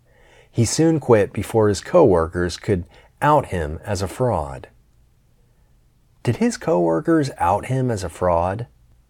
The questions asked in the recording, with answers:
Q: Did his coworkers out him as a fraud?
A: No, he quit before his coworkers could out him as a fraud.